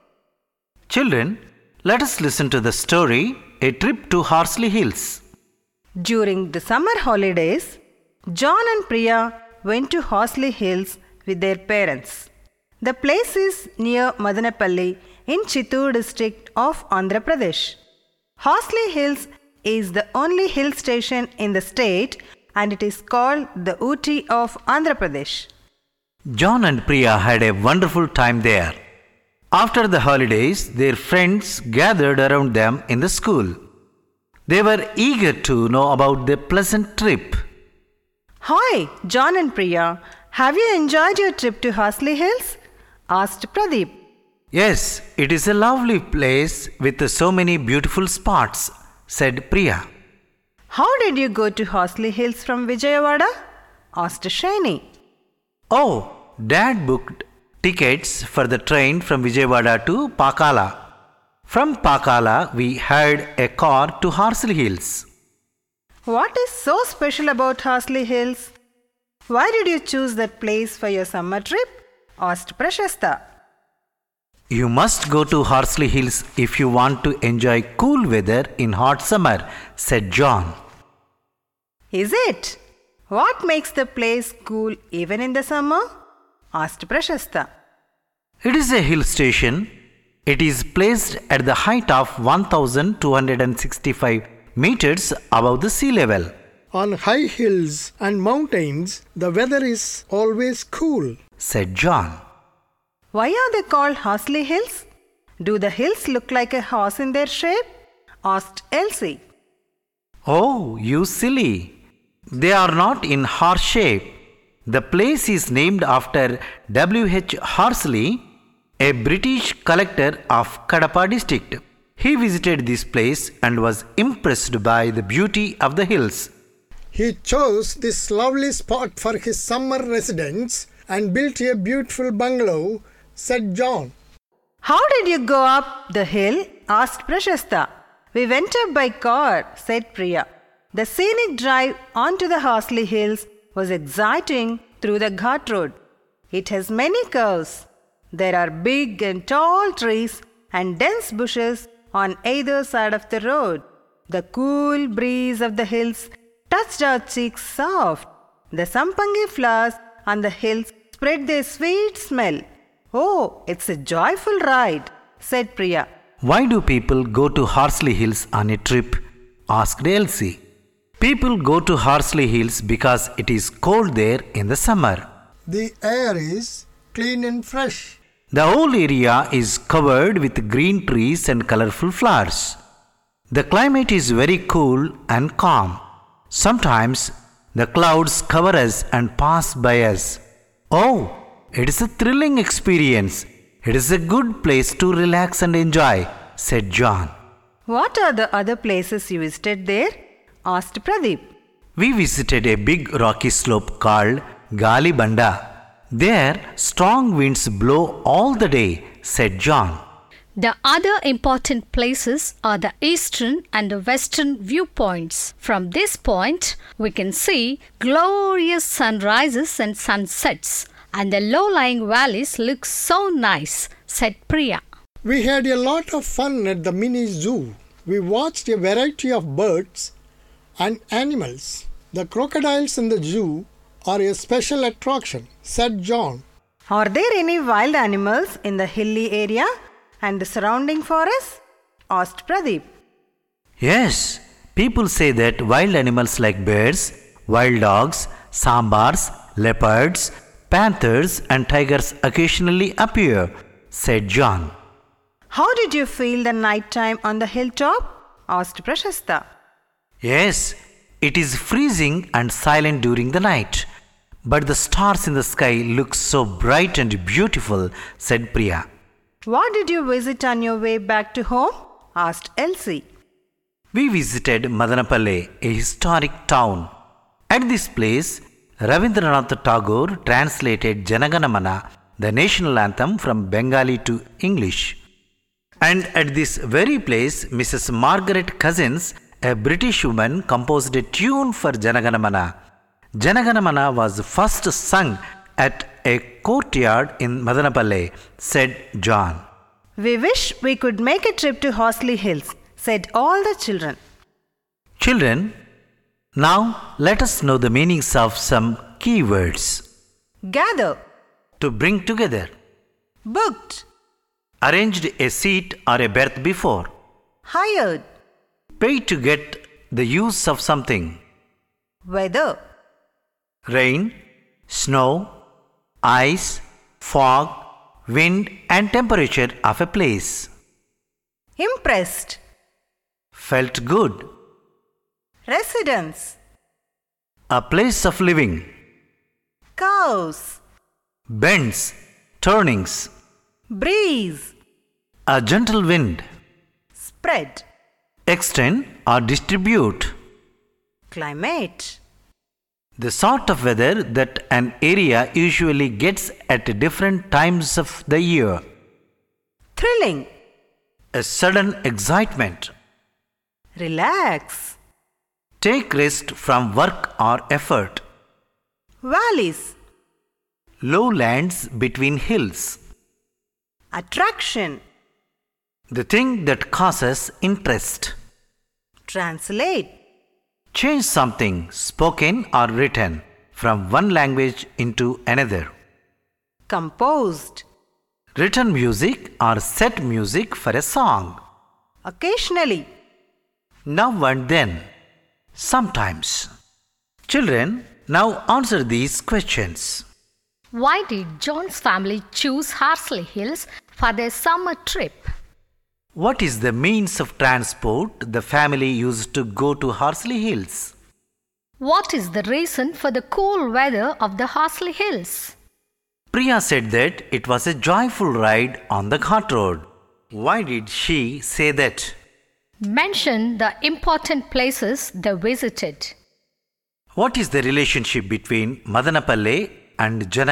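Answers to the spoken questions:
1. To enjoy cool weather in hot summer
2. Train from Vijayawada to Pakala, then a hired car
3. It is a hill station 1,265 meters above sea level
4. The ghat road had many curves, tall trees, a cool breeze and sweet-smelling sampangi flowers
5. Galibanda, the eastern and western viewpoints, the mini zoo, and Madanapalle
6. Tagore translated it into English there, Margaret Cousins composed its tune there, and it was first sung there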